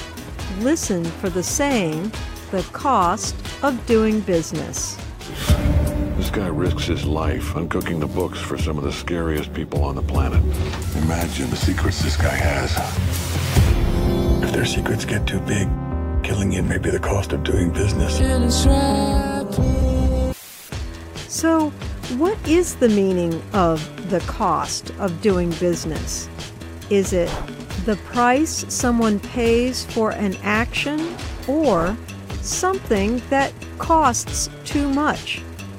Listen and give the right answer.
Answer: The cost of doing business means the price you pay for an action.